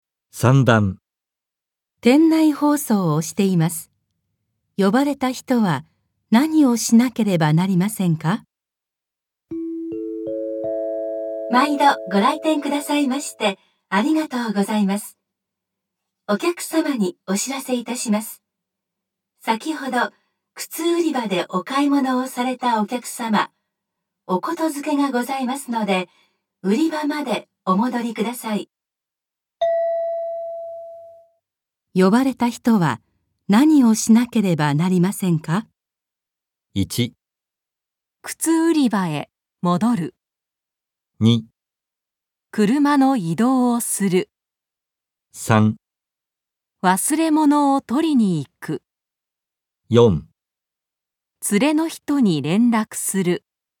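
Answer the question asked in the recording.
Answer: 1: 靴売り場へ戻る。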